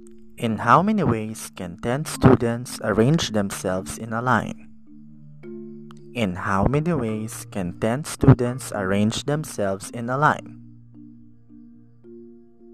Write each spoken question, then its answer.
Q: In how many ways can 10 students arrange themselves in a line?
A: 3,628,800, you are correct.